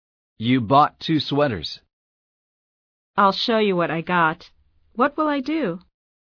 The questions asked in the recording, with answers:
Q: What will I do?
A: You will show me what you got.